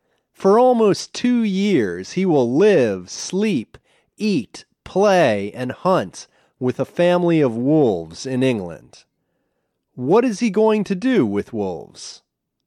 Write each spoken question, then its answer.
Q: What is he going to do with wolves?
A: He is going to live, sleep, eat, play, and hunt with wolves.